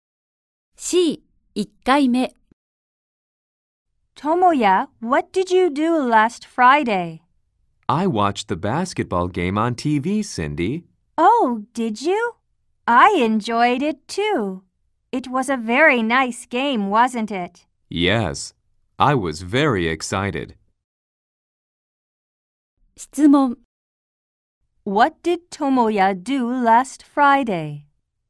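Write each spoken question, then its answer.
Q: What did Tomoya do last Friday?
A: He watched the basketball game on TV.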